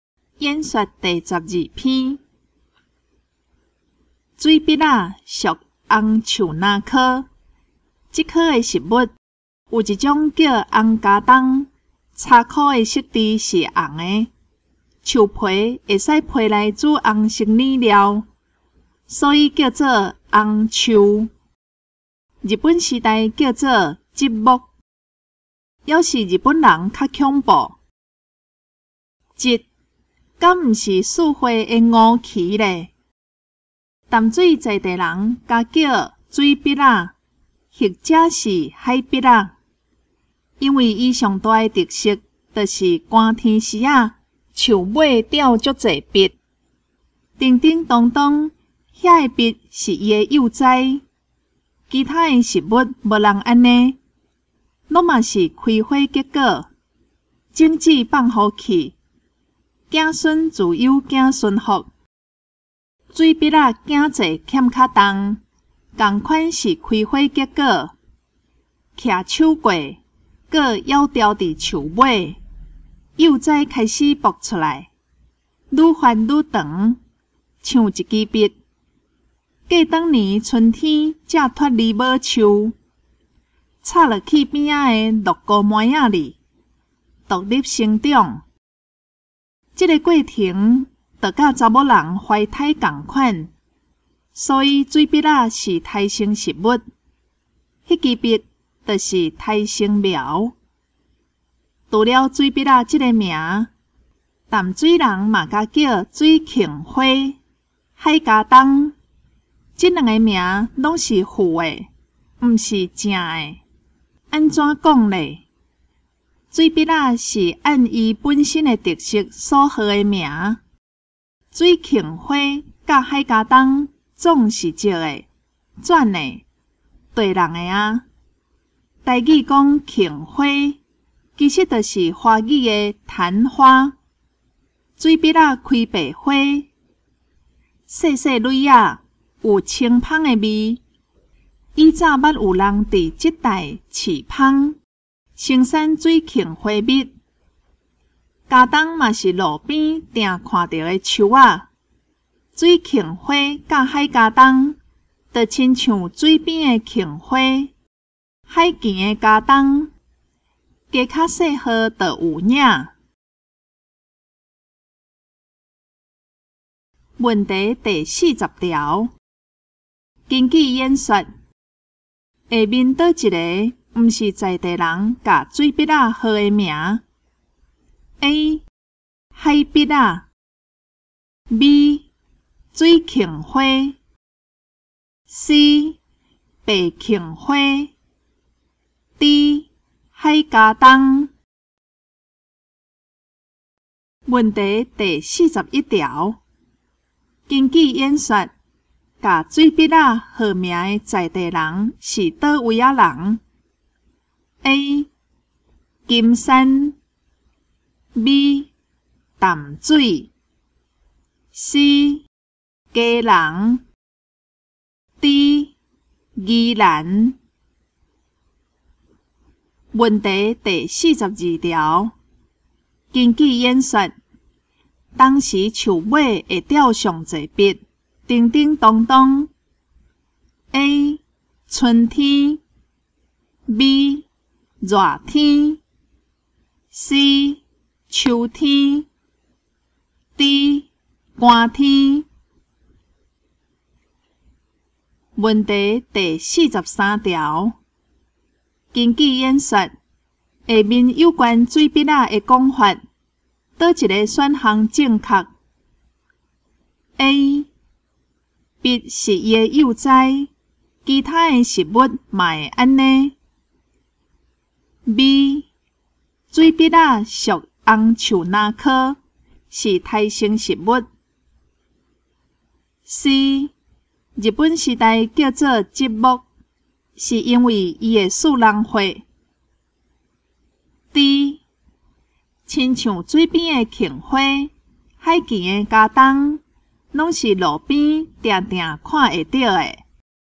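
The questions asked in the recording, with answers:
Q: 根据演说,下面倒一个。不是在地人把水笔仔号的名 A 海笔仔 B 水芹花 C 白芹花 D 海加冬。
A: C: 白芹花

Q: 根据演说,把水笔仔号名的在地人是哪位啊人?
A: B: 淡水

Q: 根据演说,当时树尾会掉上一笔,叮叮当当。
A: D: 寒天

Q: 根据演说,下面有关水笔仔的讲法,倒一个选项正确 ?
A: B: 水笔仔属红树那科,是胎生食物。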